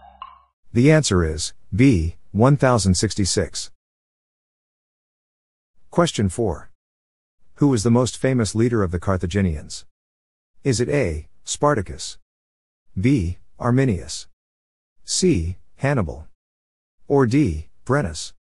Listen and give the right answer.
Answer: The answer is C, Hannibal.